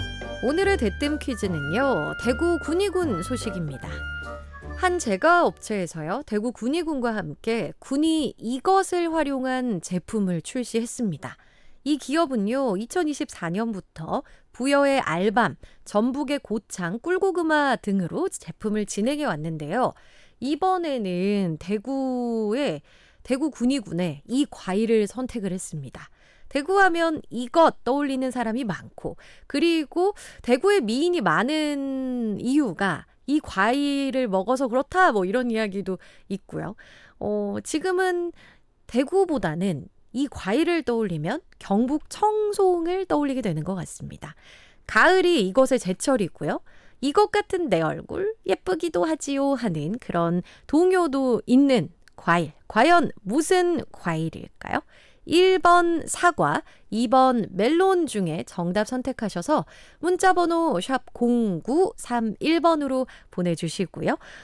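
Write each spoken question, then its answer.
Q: 과연 무슨 과일일까요? 1번 사과, 2번 멜론 중에 정답 선택하셔서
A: 1: 사과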